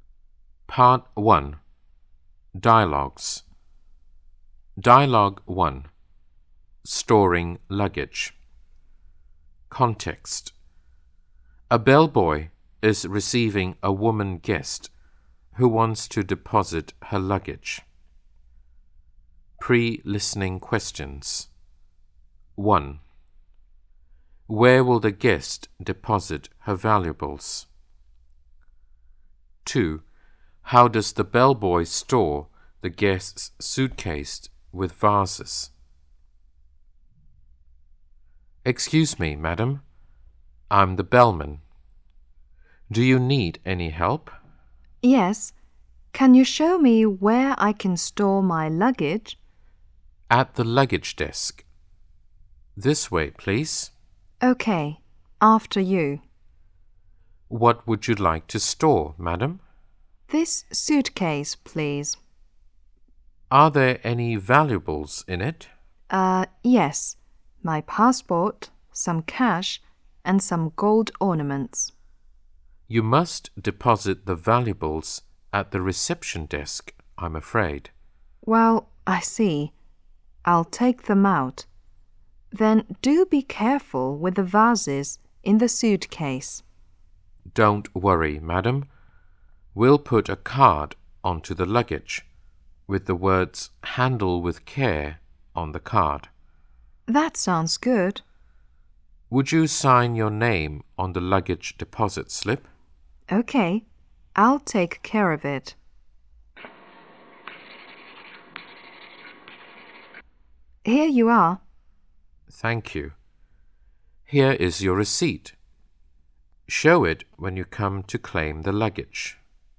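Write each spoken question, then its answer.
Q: Where will the guest deposit her valuables?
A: At the reception desk

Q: How does the bellboy store the guest's suitcase with vases?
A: He puts a card saying "Handle with care" on it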